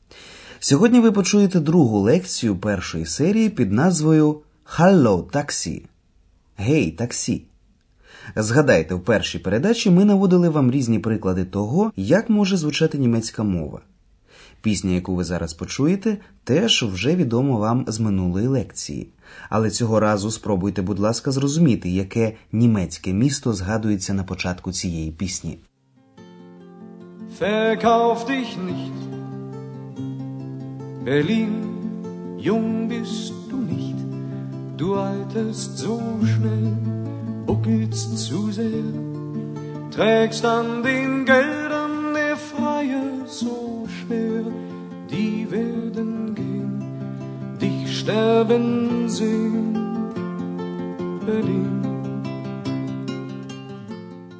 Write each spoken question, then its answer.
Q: Але цього разу спробуйте, будь ласка, зрозуміти, яке німецьке місто згадується на початку цієї пісні.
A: Берлін. Берлін.